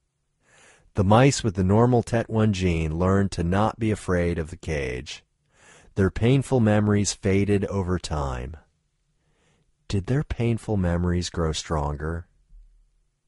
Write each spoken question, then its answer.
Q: Did their painful memories grow stronger?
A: No, their painful memories didn't grow stronger.